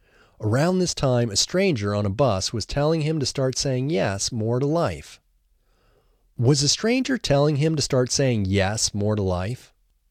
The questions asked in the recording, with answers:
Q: Was a stranger telling him to start saying yes more to life?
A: Yes, a stranger was telling him to start saying yes more to life.